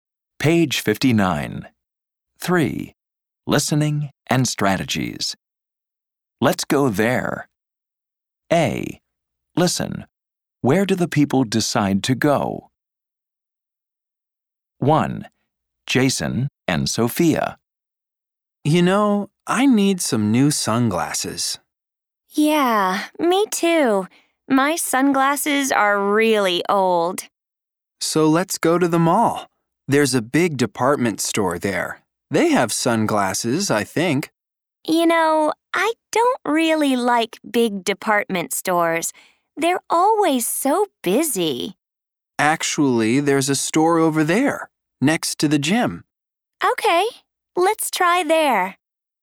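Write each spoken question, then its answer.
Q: Where do the people decide to go?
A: a store next to the gym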